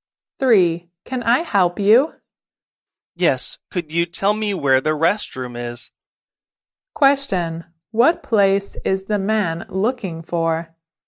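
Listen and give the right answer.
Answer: The restroom.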